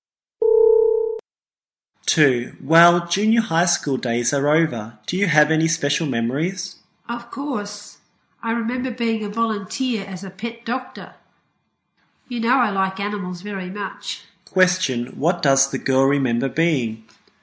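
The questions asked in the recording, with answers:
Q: What does the girl remember being?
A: A volunteer pet doctor.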